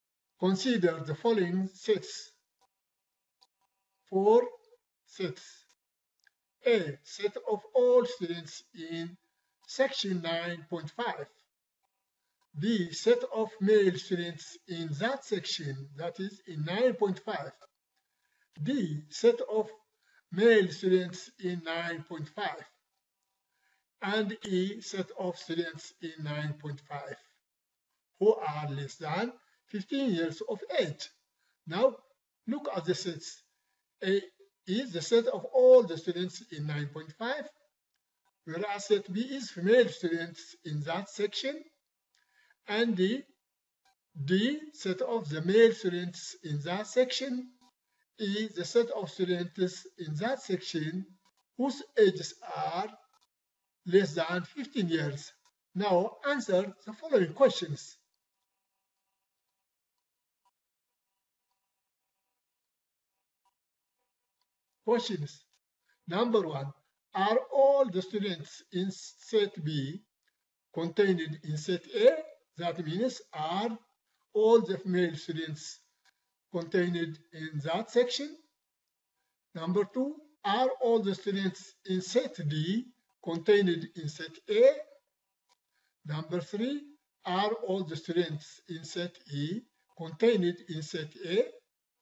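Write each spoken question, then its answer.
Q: are all the students in set B contained in set A?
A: Yes

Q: are all the students in set D contained in set A?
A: Yes

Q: are all the students in set E contained in set A?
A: Yes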